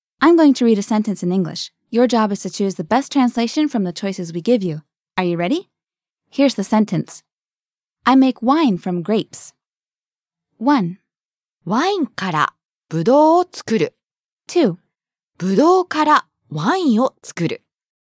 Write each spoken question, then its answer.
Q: I make wine from grapes.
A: ブドウからワインを作る。 I make wine from grapes.